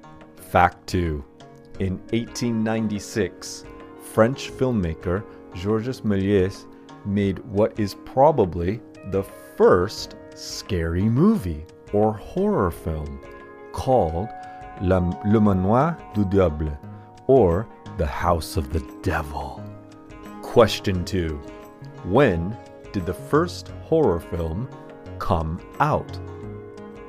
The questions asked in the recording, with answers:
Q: When did the first horror film come out?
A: The first horror film came out in 1896